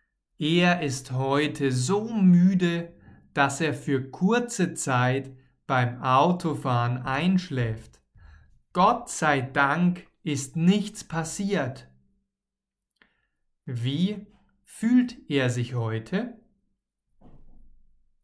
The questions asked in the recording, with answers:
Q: Wie fühlt er sich heute?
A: müde. Er fühlt sich heute so müde.